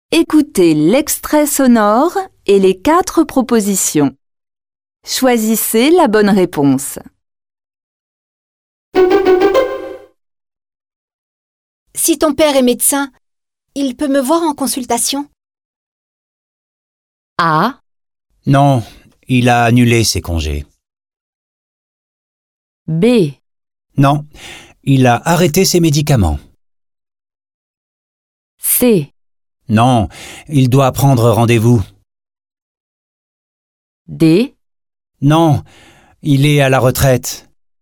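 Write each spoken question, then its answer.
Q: Si ton père est médecin, il peut me voir en consultation?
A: D: Non, il est à la retraite.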